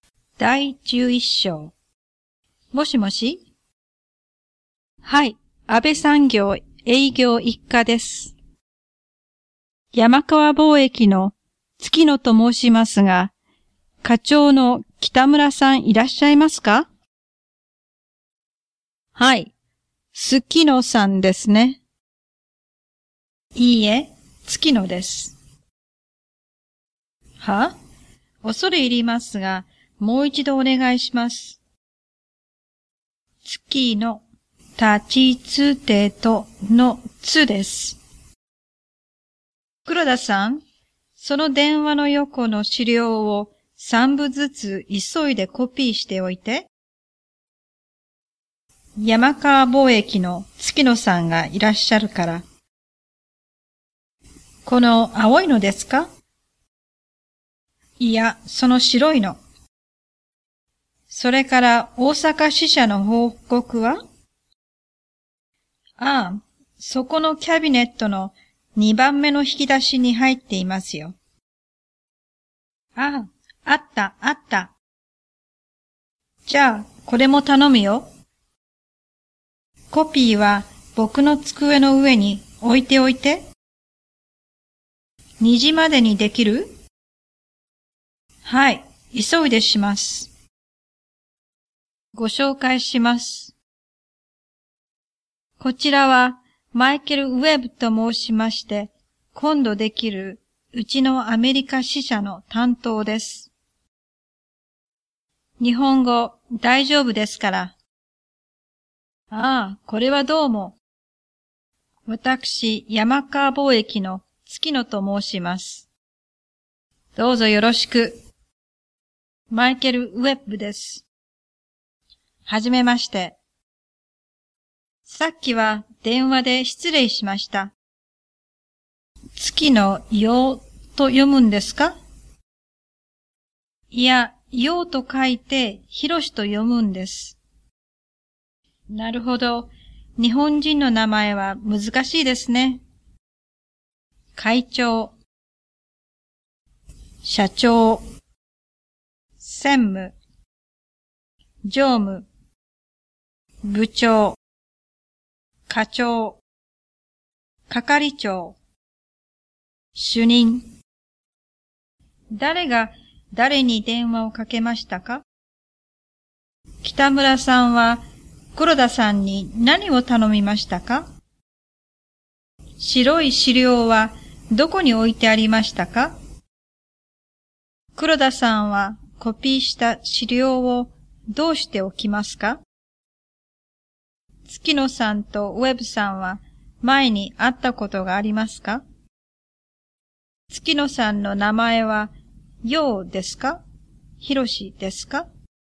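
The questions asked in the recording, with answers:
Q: 誰が誰に電話をかけましたか?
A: 山川貿易の月野さんが北村課長に電話をかけました

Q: 北村さんは黒田さんに何を頼みましたか?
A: 資料を三部ずつ急いでコピーすること

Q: 白い資料はどこに置いてありましたか?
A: 電話の横

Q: 黒田さんはコピーした資料をどうしておきますか?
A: 北村さんの机の上に置いておきます

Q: 月野さんとウェブさんは前に会ったことがありますか?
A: いいえ、会ったことはありません(前に電話で話しただけです)

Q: 月野さんの名前はようですか?ひろしですか?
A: ひろし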